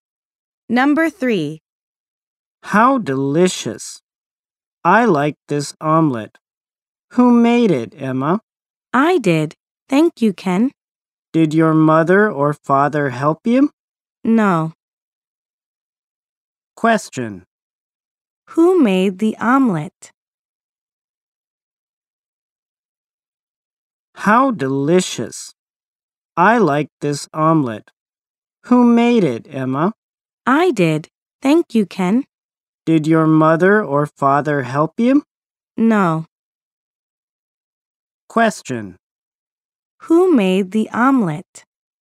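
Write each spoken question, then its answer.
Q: Who made the omelet?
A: Emma did.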